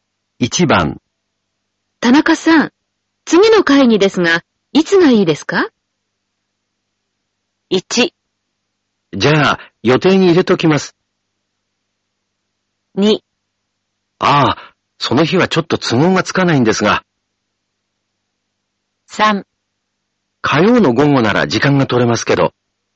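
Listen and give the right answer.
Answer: 3: 火曜の午後なら時間が取れますけど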